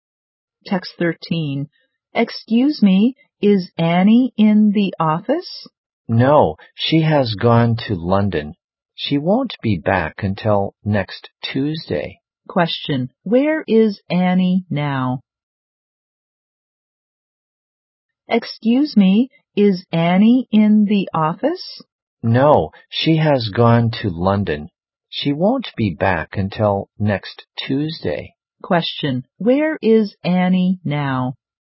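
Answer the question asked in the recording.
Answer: In London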